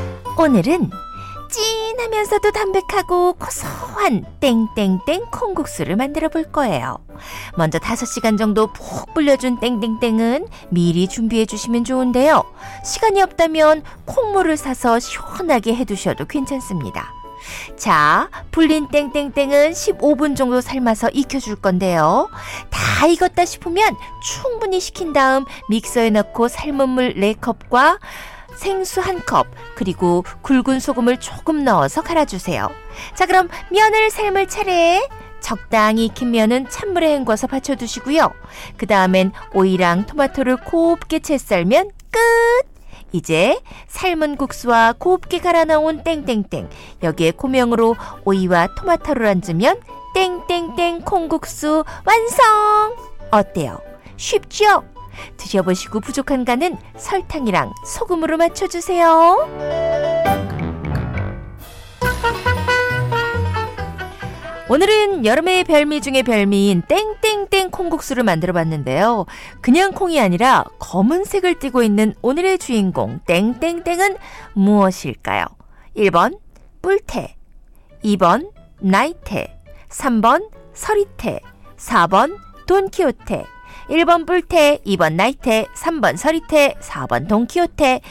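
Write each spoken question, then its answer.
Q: 그냥 콩이 아니라 검은색을 띠고 있는 오늘의 주인공 땡땡땡은 무엇일까요?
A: 3: 서리테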